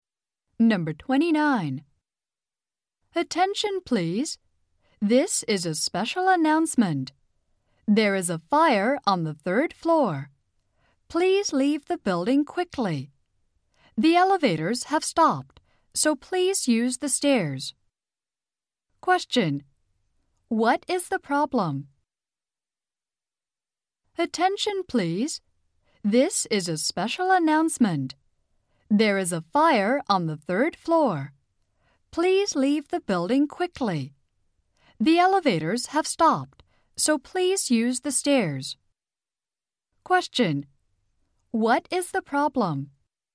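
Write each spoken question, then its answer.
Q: What is the problem?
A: There is a fire on the third floor.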